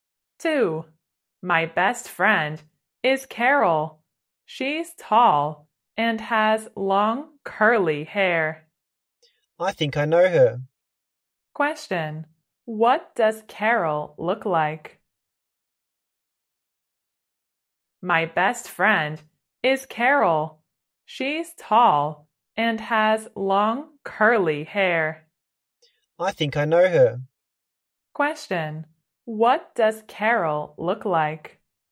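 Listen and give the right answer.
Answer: Tall with long curly hair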